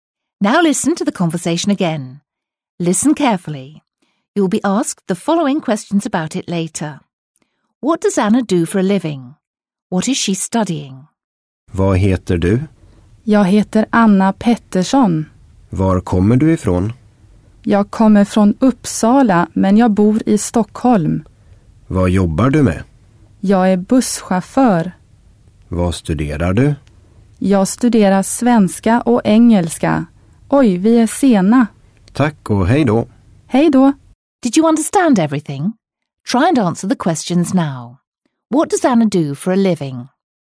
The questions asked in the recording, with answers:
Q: What does Anna do for a living?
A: If you said that she's a bus driver, you're absolutely right.

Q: What is she studying?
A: If your answer was Swedish and English, you got it right again.